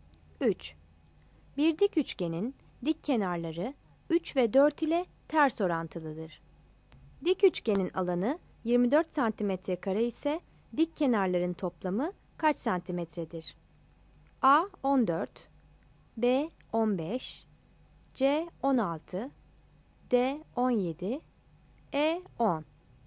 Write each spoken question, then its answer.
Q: Dik üçgenin alanı 24 santimetre kare ise dik kenarların toplamı kaç santimetredir?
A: Yanıt A'dır.